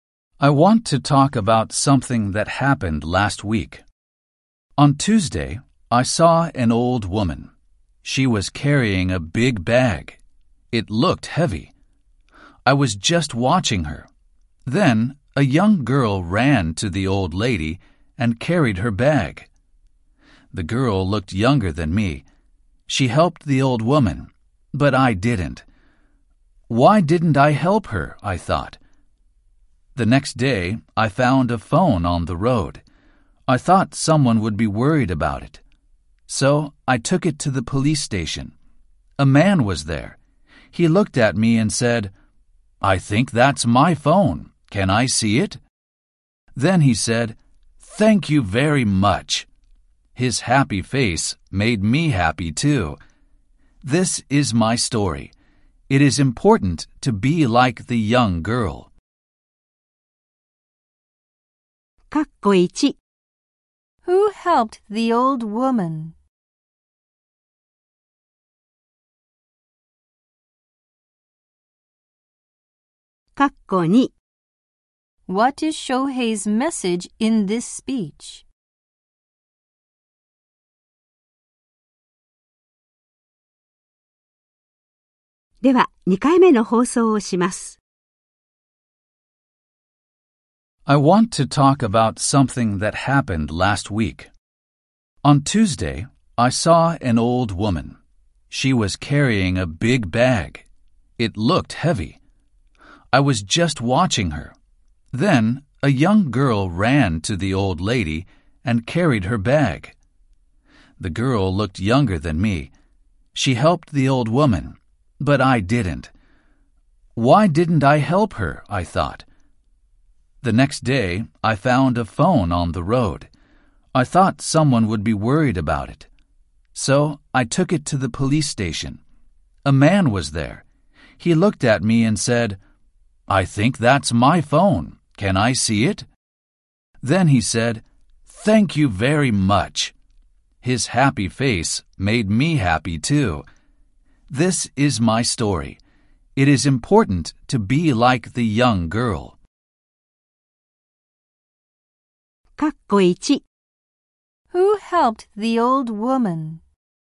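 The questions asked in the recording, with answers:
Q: Who helped the old woman?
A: A young girl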